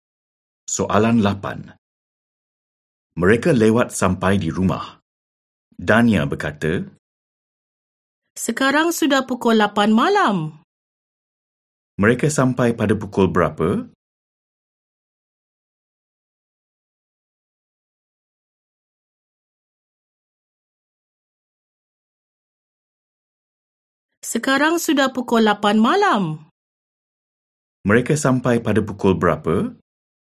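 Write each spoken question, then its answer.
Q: Mereka sampai pada pukul berapa?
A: Pukul 8 malam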